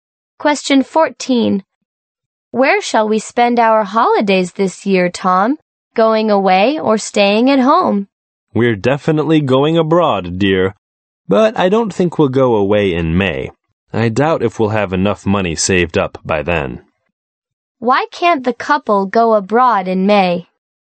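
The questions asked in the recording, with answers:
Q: Why can't the couple go abroad in May?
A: They won't have saved enough money by then.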